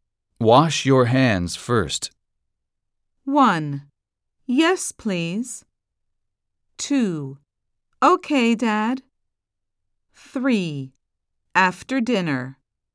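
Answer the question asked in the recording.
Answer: 2: Okay, Dad.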